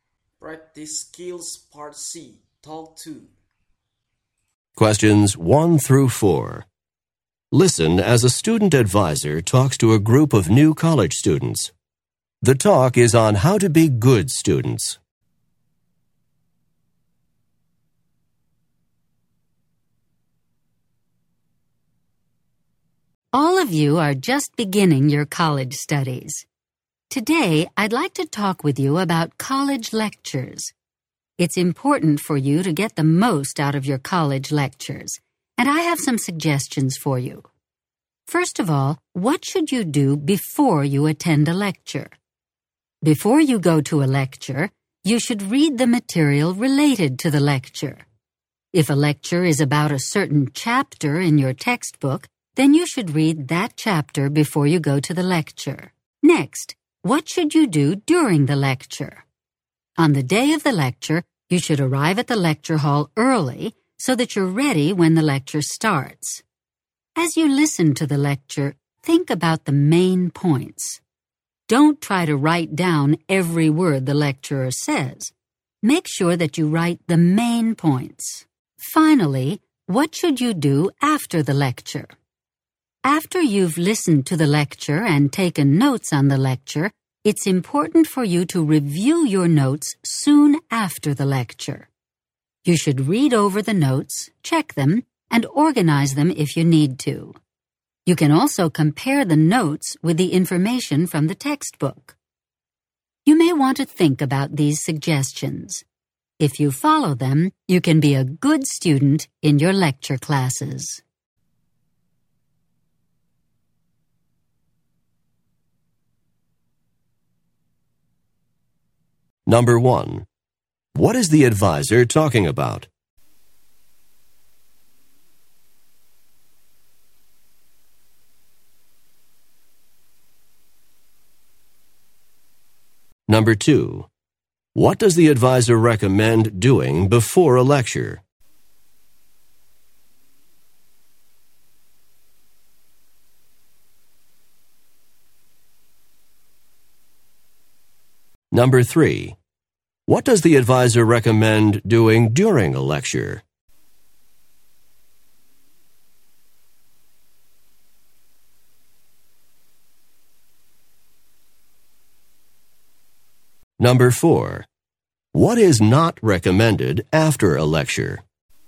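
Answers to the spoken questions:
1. How to get the most out of college lectures
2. Read the related material
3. Write down the main points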